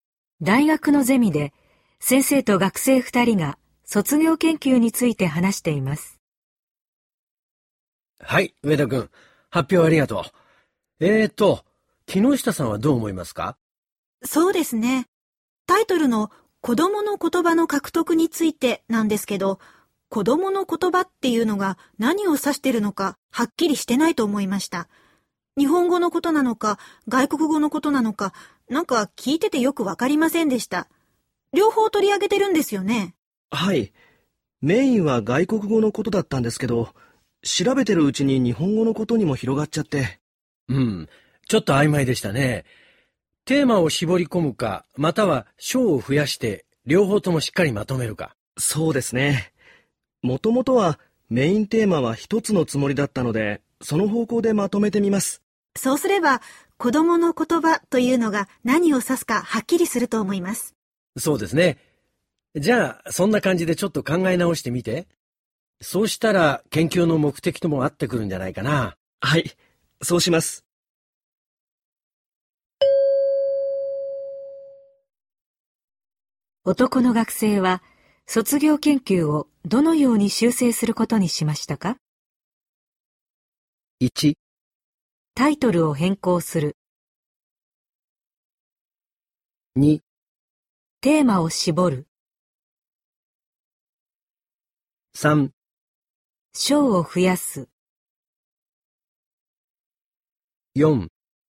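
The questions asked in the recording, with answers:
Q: 男の学生は卒業研究をどのように修正することにしましたか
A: 2: テーマを絞る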